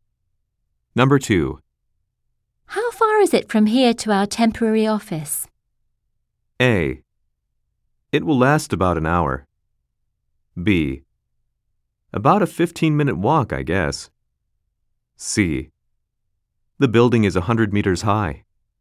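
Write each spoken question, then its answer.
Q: How far is it from here to our temporary office?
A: B: About a 15-minute walk, I guess.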